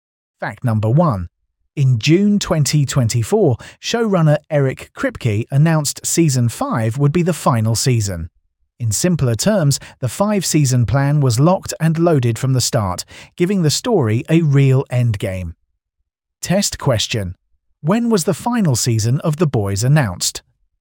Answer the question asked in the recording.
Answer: June 2024.